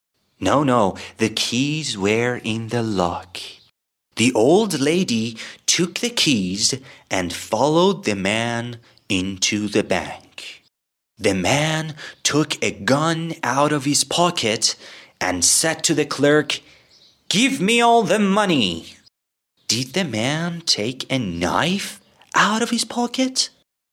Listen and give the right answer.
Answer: No. The man took a gun out of his pocket